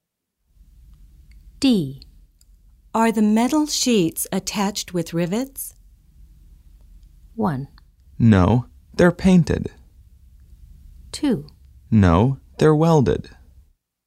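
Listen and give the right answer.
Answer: 2: No, they're welded.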